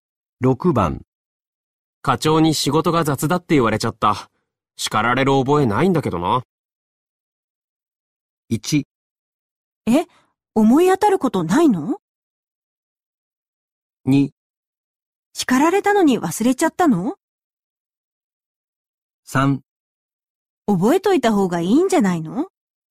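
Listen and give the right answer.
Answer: 1: え、思い当たることないの。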